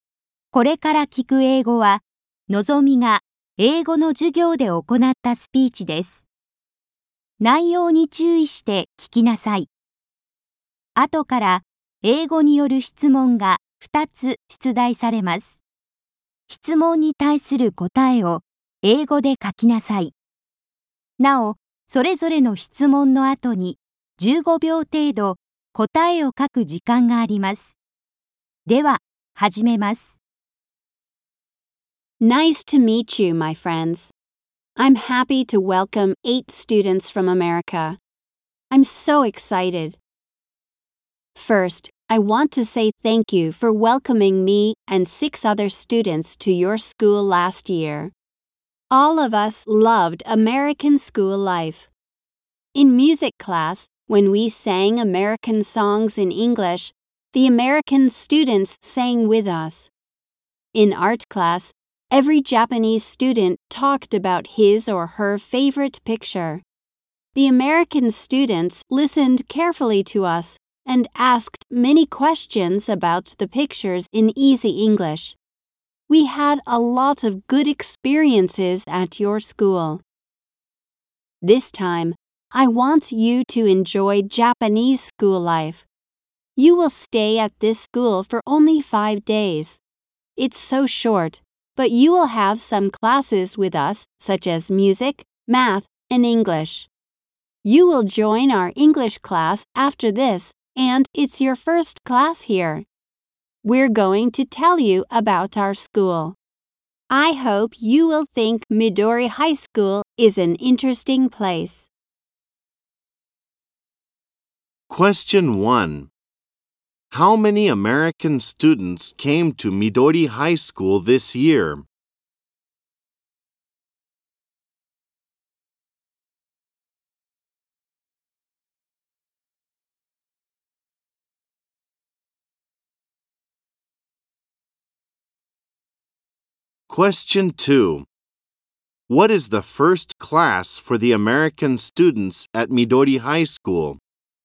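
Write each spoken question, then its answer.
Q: How many American students came to Midori High School this year?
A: Eight students came.

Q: What is the first class for the American students at Midori High School?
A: English class.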